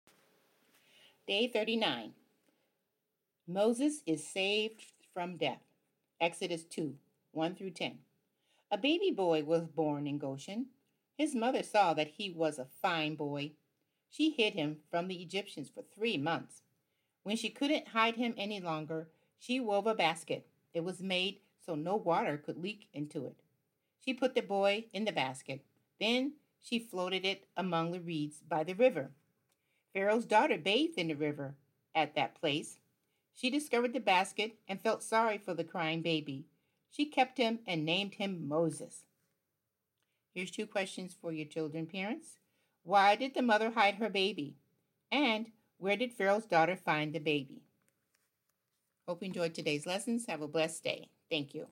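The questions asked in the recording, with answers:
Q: And where did Pharaoh's daughter find the baby?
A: In a basket among the reeds by the river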